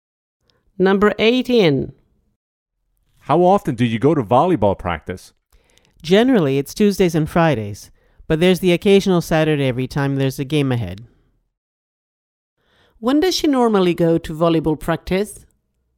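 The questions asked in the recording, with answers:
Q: When does she normally go to volleyball practice?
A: Tuesdays and Fridays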